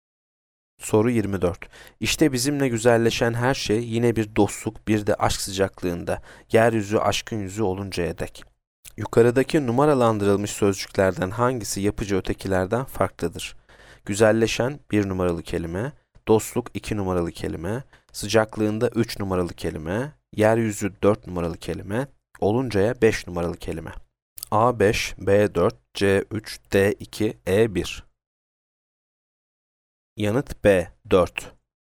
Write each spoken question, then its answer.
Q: Yukarıdaki numaralandırılmış sözcüklerden hangisi yapıcı ötekilerden farklıdır?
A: Yanıt B, 4.